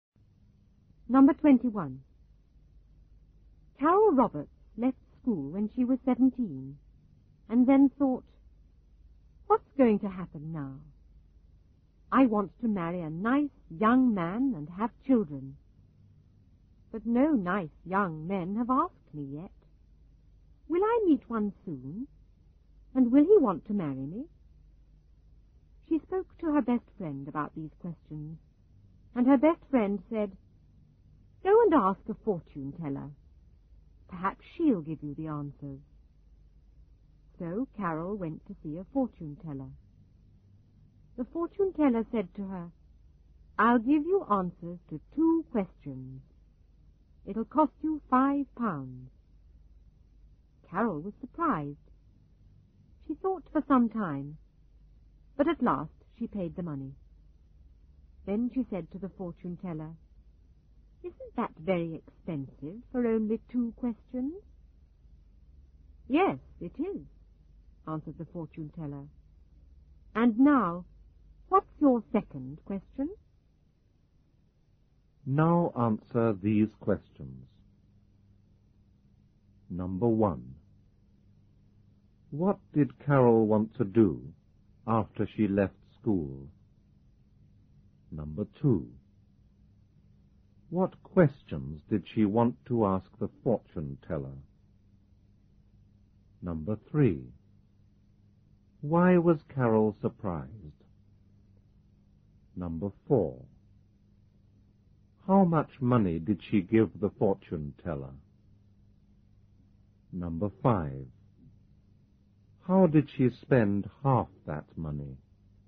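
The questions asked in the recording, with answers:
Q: What did Carol want to do after she left school?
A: Marry a nice young man and have children

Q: What questions did she want to ask the fortune teller?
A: Will I meet a nice young man soon? And will he want to marry me?

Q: Why was Carol surprised?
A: Because it cost £5 for only two questions

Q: How did she spend half that money?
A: By asking whether it wasn't very expensive for only two questions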